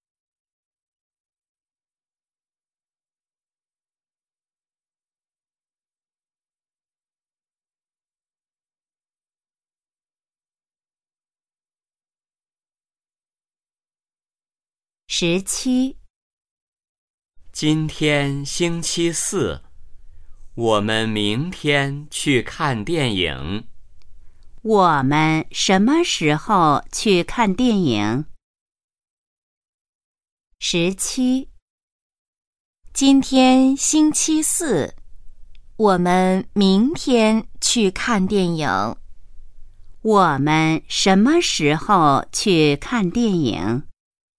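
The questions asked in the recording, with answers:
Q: 我们什么时候去看电影?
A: 明天(星期五)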